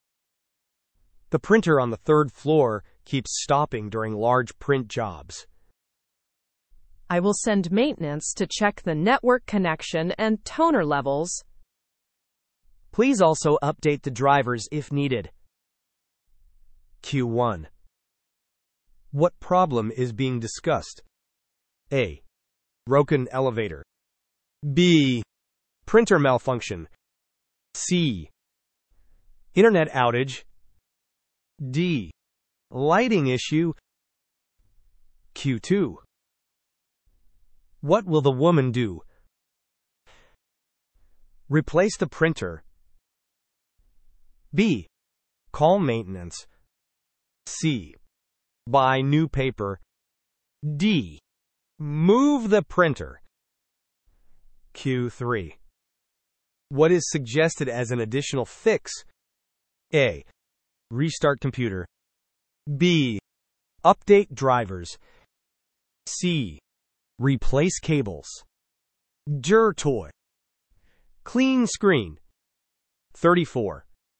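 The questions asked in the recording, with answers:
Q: What problem is being discussed?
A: B: Printer malfunction.

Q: What will the woman do?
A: B: Call maintenance.

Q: What is suggested as an additional fix?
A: B: Update drivers.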